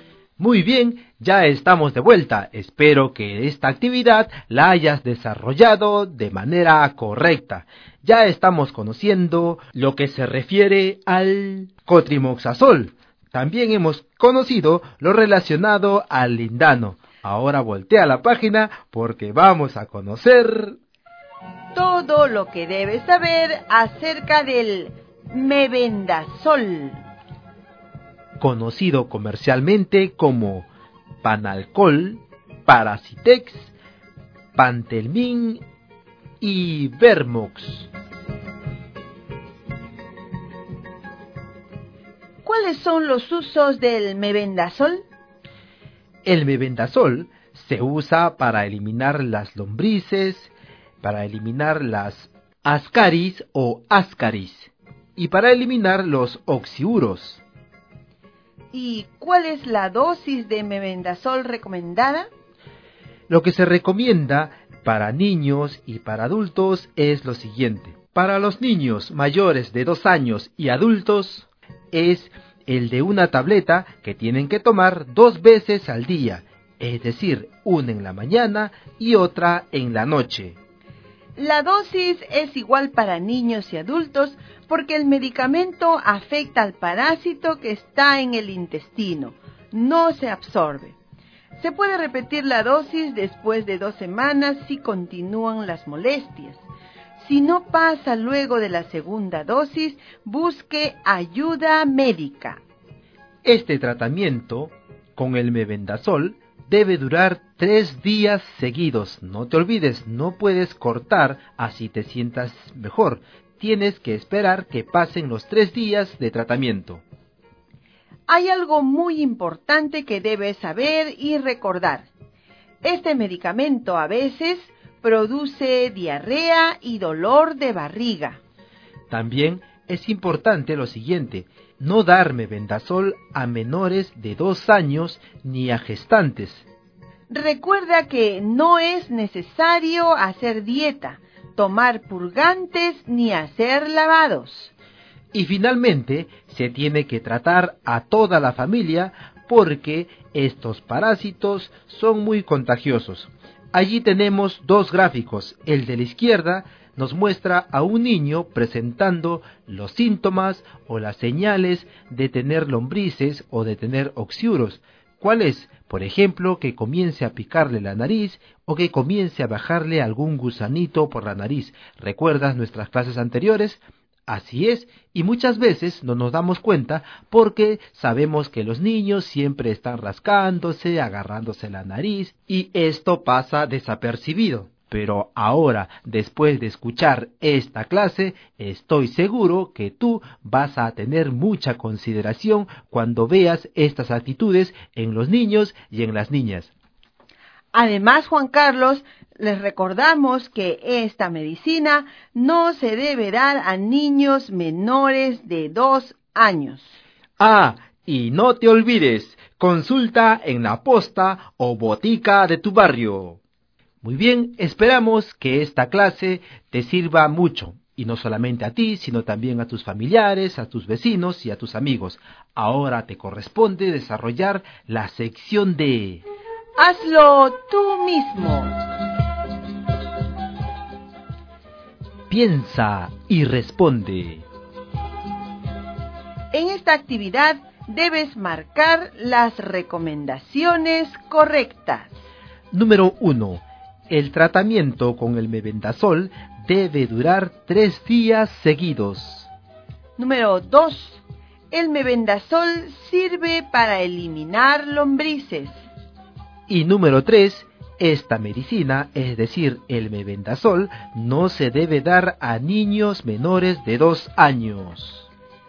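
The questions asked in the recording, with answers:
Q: El tratamiento con el mebendazol debe durar 3 días seguidos.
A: Correcta

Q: El mebendazol sirve para eliminar lombrices.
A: Correcta

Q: Esta medicina, es decir, el mebendazol, no se debe dar a niños menores de 2 años.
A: Correcta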